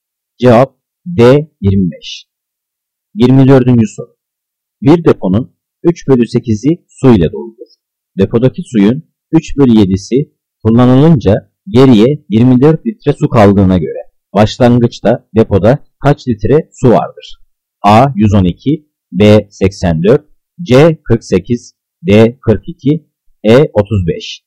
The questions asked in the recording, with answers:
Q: Depodaki suyun 3 bölü 7'si kullanılınca geriye 24 litre su kaldığına göre başlangıçta depoda kaç litre su vardır?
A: Cevap D 42.